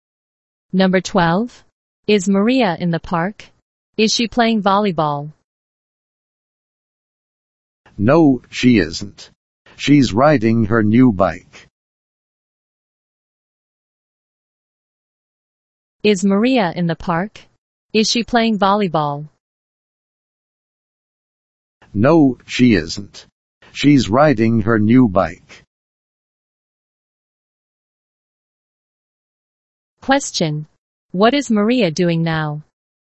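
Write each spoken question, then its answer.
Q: What is Maria doing now?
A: Riding her new bike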